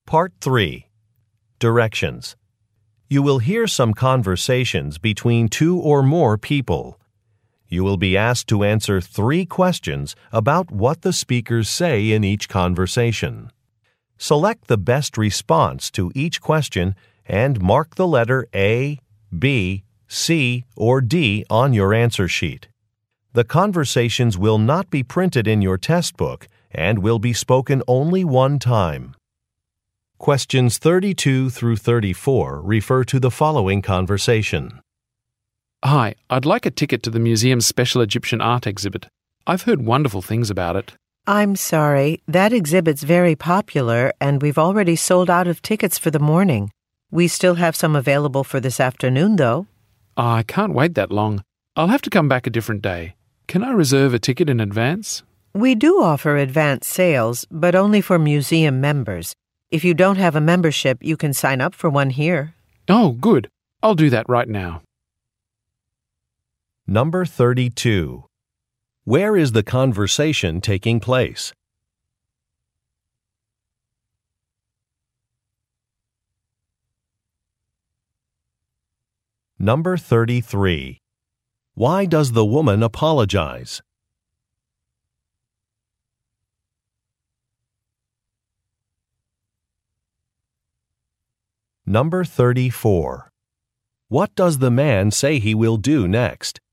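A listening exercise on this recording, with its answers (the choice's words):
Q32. Where is the conversation taking place?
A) At a park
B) At a museum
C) At a theater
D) At a car dealership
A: At a museum

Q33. Why does the woman apologize?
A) An office is about to close.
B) An event has been canceled.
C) Some tickets are unavailable.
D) Some prices have increased.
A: Some tickets are unavailable.

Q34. What does the man say he will do next?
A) Phone a friend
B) Register a complaint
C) Go to a different location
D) Sign up for a membership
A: Sign up for a membership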